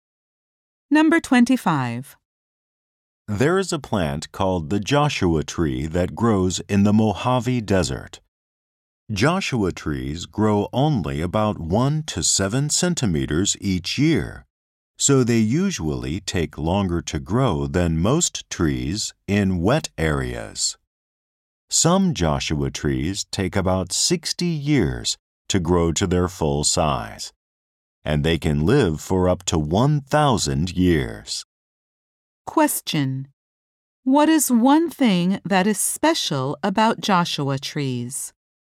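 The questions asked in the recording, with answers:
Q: What is one thing that is special about Joshua trees?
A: They grow very slowly and can live up to 1,000 years.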